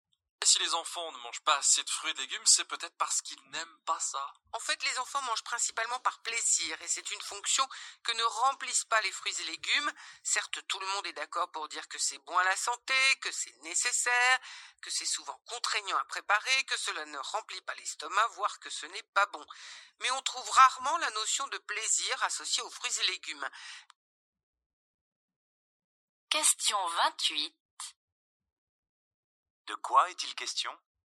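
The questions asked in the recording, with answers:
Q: De quoi est-il question ?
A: Des enfants qui ne mangent pas assez de fruits et légumes parce qu'ils n'y associent pas de plaisir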